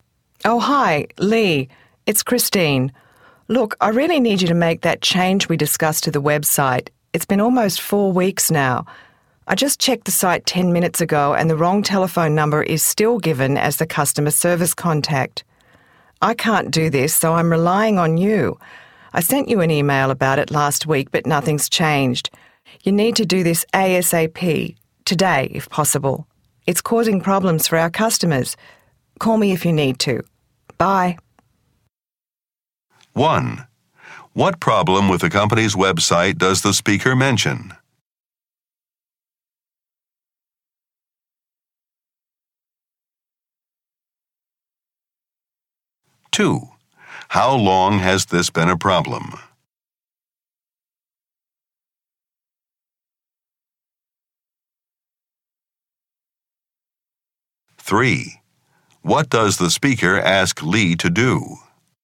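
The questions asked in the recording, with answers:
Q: What problem with the company's website does the speaker mention?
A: The wrong customer service telephone number is listed

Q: How long has this been a problem?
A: Almost 4 weeks

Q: What does the speaker ask Lee to do?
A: Fix the website today, as soon as possible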